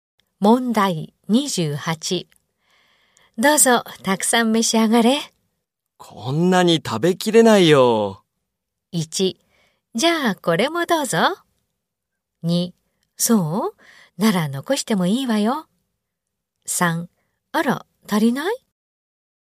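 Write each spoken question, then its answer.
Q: どうぞ、たくさん召し上がれ。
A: 3: そう?なら残してもいいわよ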